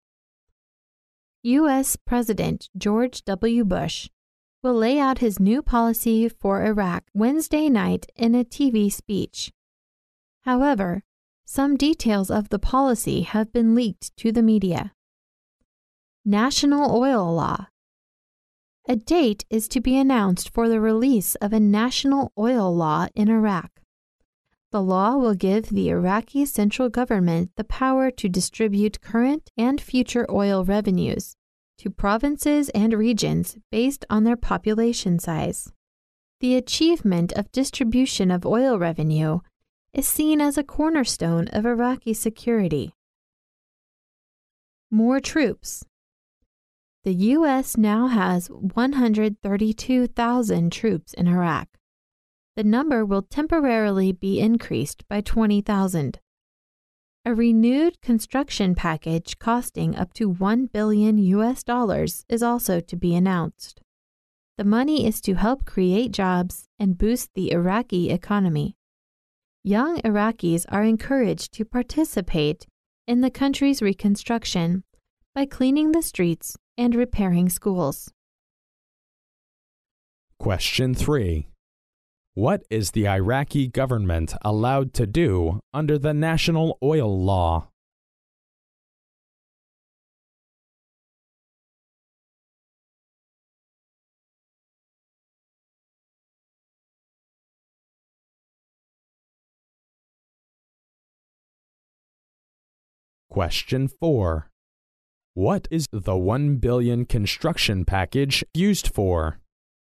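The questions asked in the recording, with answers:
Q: What is the Iraqi government allowed to do under the National Oil Law?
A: Distribute current and future oil revenues to provinces and regions based on population size

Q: What is the $1 billion construction package used for?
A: To help create jobs and boost the Iraqi economy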